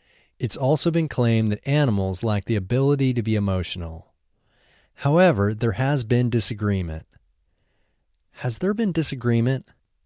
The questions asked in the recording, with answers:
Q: Has there been disagreement?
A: Yes, there has been disagreement.